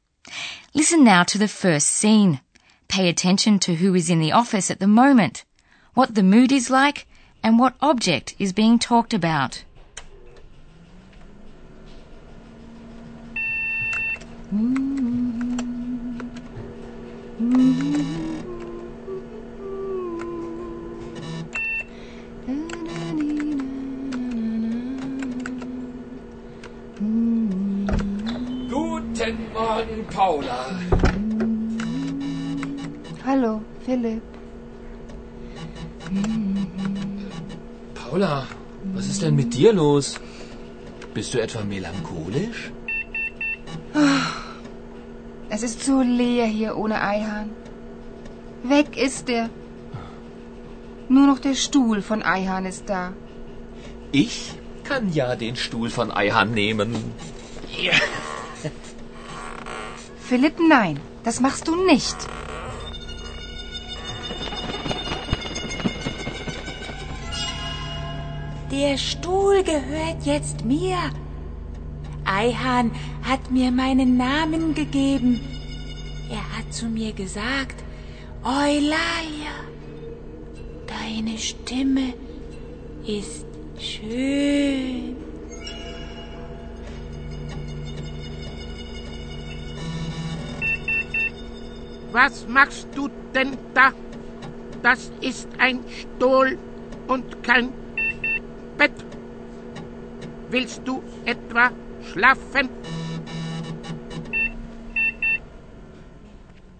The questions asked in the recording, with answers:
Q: Pay attention to who is in the office at the moment, what the mood is like, and what object is being talked about.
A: In the office at Radio D, you first of all heard the two journalists, Paula and Philip. Paula is feeling a bit melancholy, while Philip is in the best of spirits, and they are talking about a chair, Stuhl.